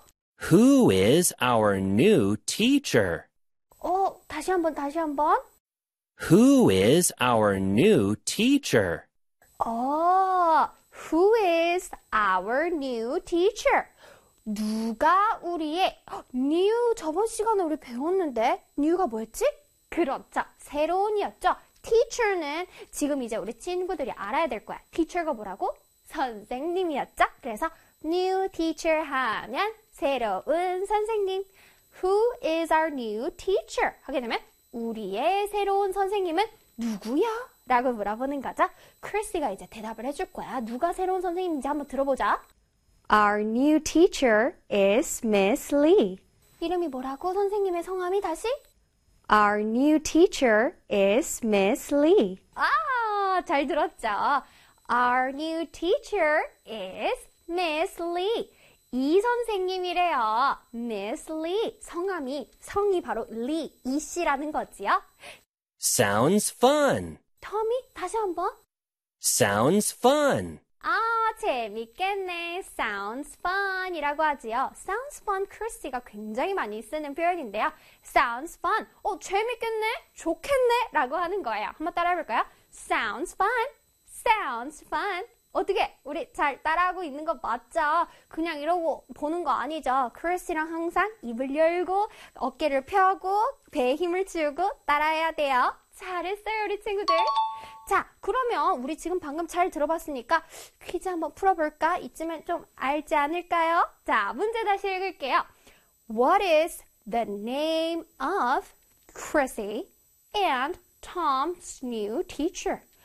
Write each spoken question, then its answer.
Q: What is the name of Chrissy and Tom's new teacher?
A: 자, 그래서 정답은 Miss Lee예요.